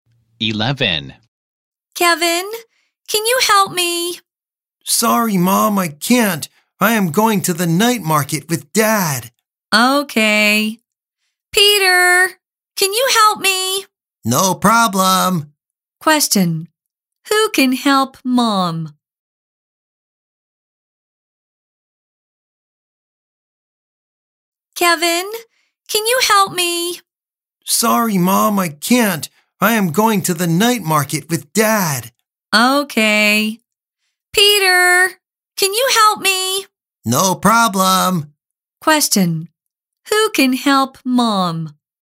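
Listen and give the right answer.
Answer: Peter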